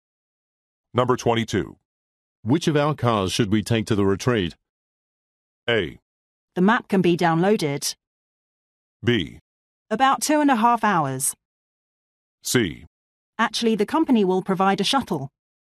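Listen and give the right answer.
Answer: C: Actually, the company will provide a shuttle.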